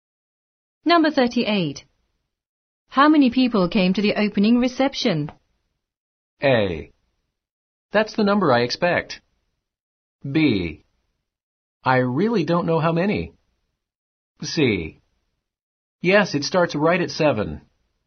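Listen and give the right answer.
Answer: B: I really don't know how many.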